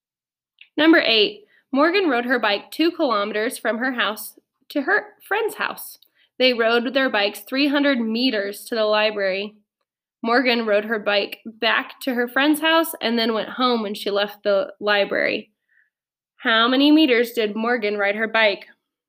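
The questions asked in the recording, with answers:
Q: How many meters did Morgan ride her bike?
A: 4,600 meters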